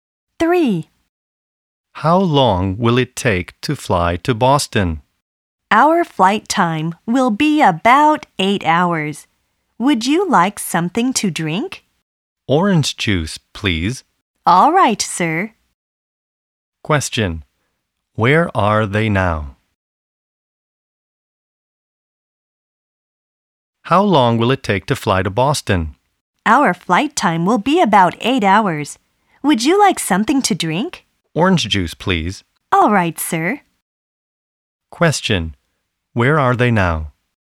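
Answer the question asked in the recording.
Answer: On a plane to Boston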